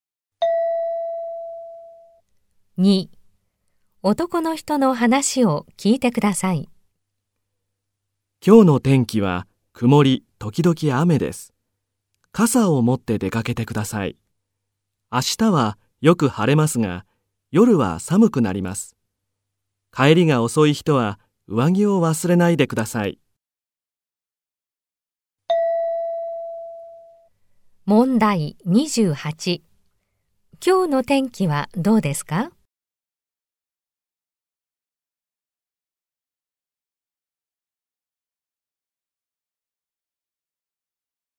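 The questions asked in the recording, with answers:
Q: 今日の天気はどうですか?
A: 曇り時々雨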